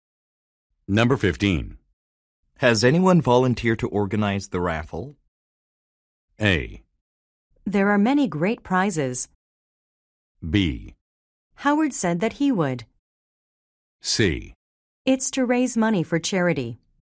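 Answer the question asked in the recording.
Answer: B: Howard said that he would.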